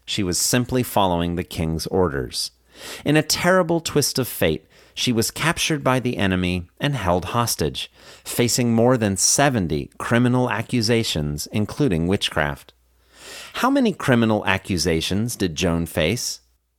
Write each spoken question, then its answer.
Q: How many criminal accusations did Joan face?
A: She faced more than 70 criminal accusations, including witchcraft.